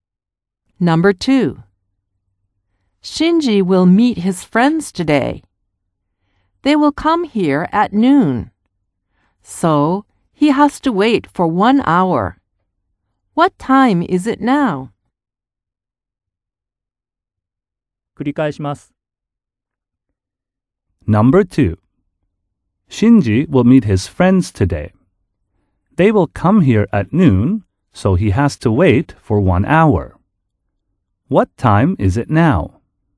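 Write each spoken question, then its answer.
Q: What time is it now?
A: 11:00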